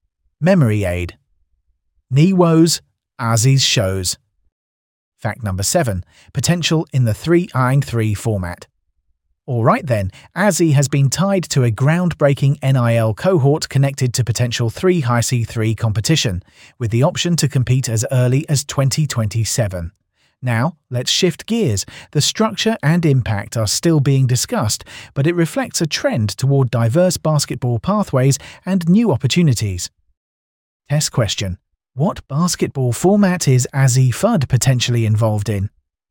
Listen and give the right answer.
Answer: Correct answer. 3-on-3 league.